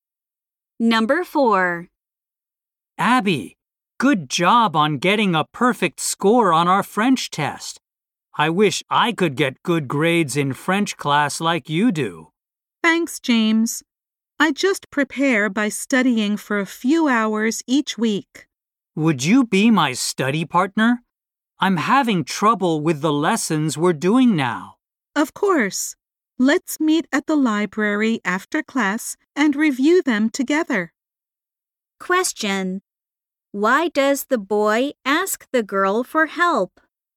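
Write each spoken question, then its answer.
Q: Why does the boy ask the girl for help?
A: He is having trouble with the French lessons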